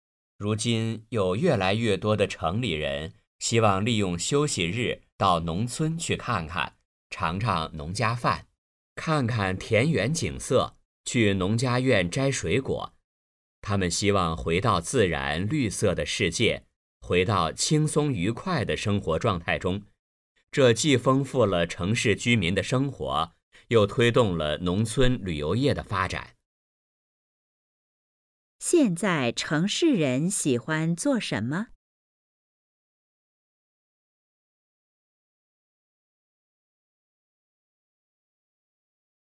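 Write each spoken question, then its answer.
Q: 现在城市人喜欢做什么?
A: 利用休息日到农村去,尝农家饭、看田园景色、摘水果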